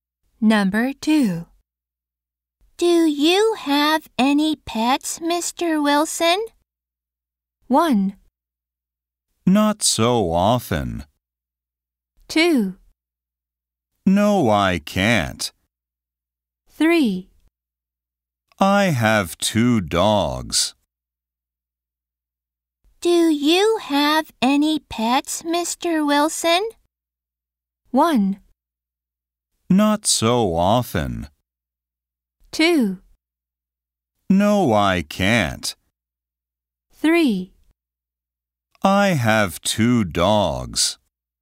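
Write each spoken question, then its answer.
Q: Do you have any pets, Mr. Wilson?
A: 3: I have 2 dogs.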